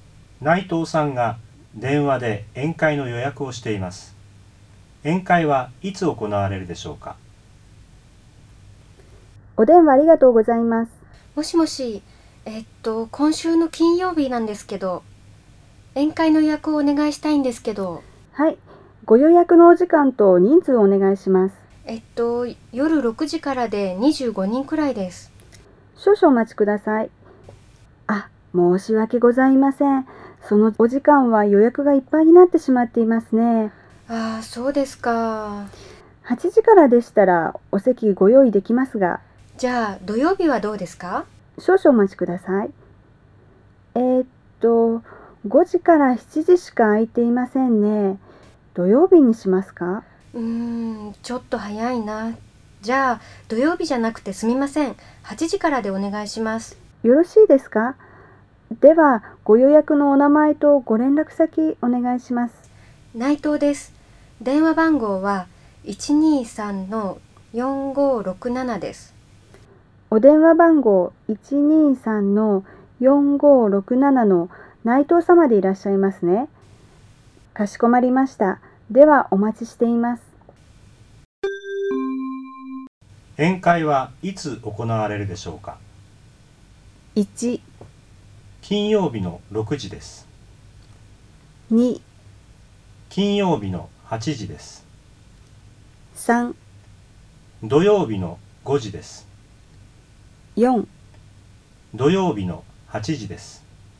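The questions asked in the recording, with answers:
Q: 宴会はいつ行われるでしょうか?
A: 2: 金曜日の8時です。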